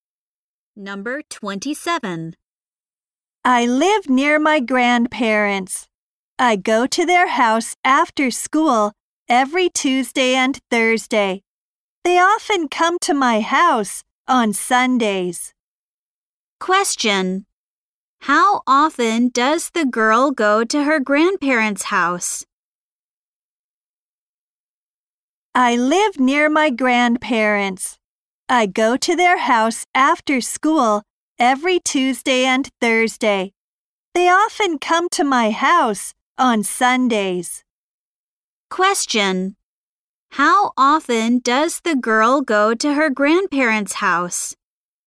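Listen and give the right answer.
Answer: Twice a week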